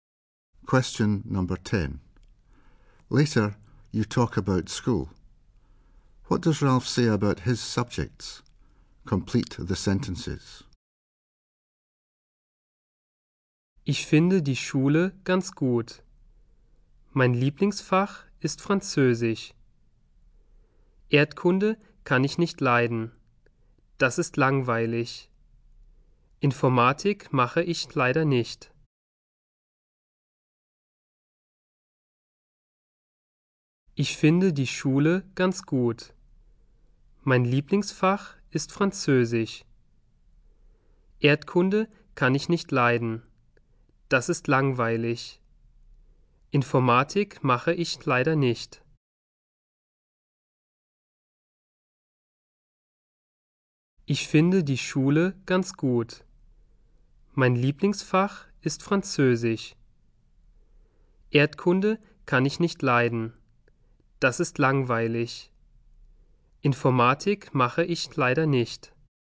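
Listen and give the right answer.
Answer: French is his favourite; he can't stand geography (boring); he doesn't do computing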